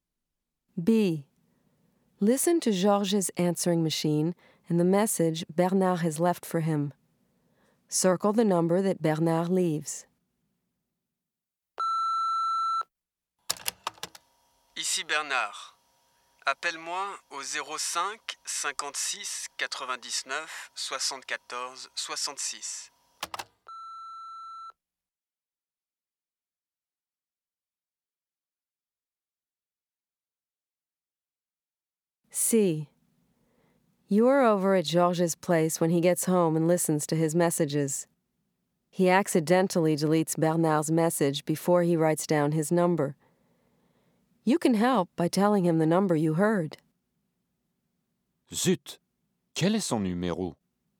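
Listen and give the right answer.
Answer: 05 56 99 74 66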